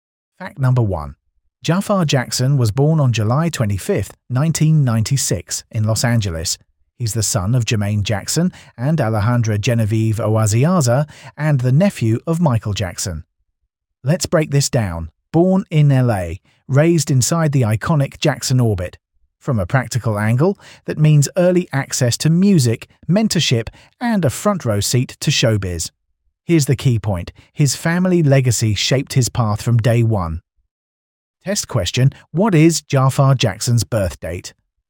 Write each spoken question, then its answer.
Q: what is Jaafar Jackson's birth date?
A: Correct answer, July 25th, 1996.